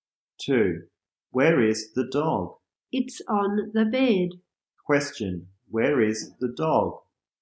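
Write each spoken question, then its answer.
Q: Where is the dog?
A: On the bed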